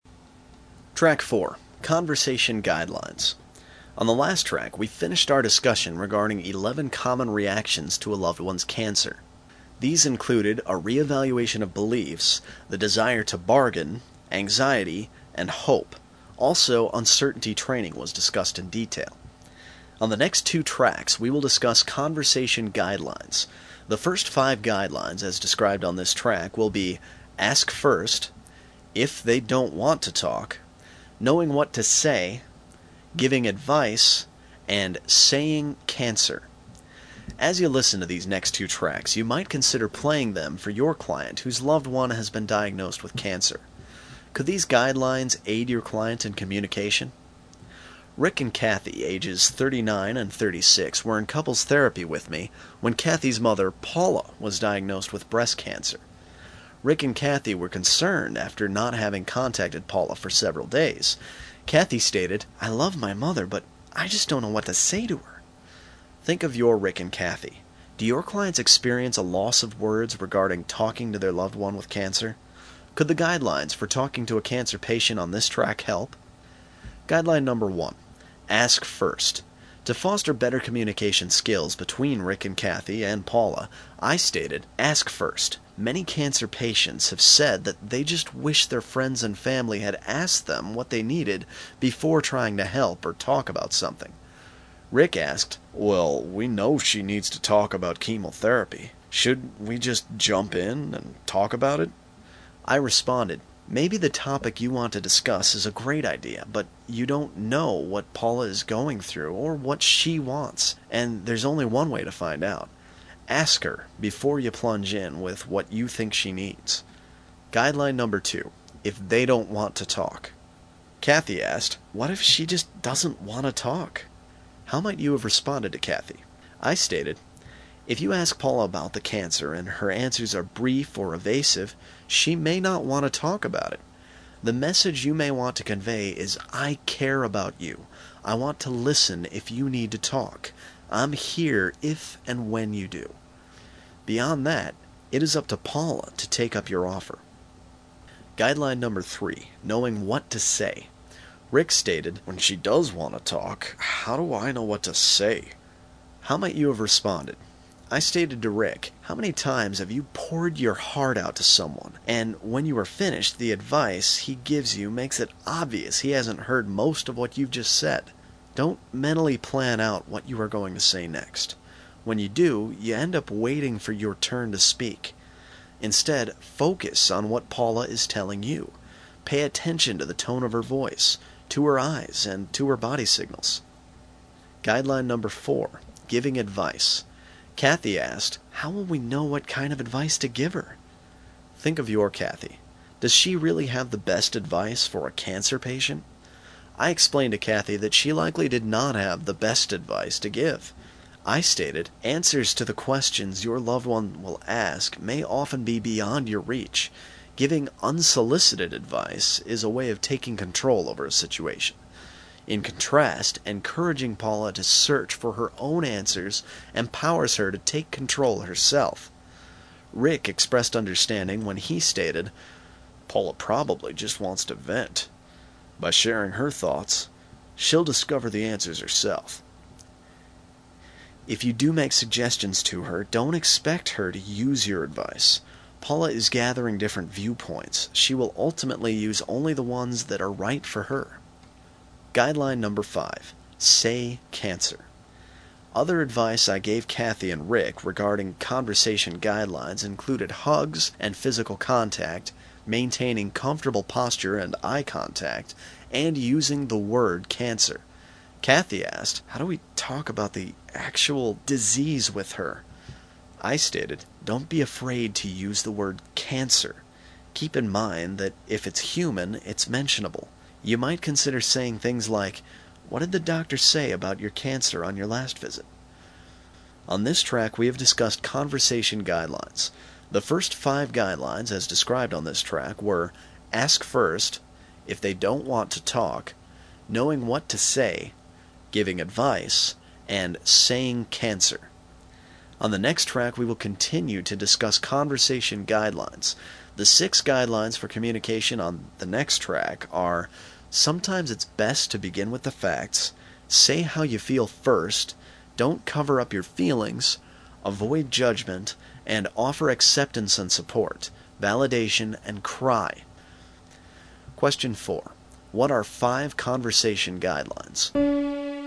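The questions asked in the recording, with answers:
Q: What are 5 conversation guidelines?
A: Ask first, if they don't want to talk, knowing what to say, giving advice, and saying cancer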